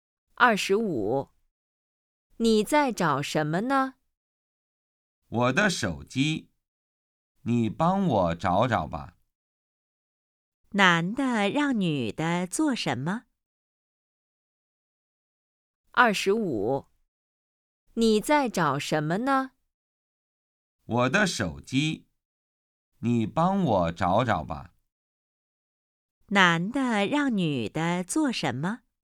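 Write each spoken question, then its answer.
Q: 男的让女的做什么?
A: 帮他找手机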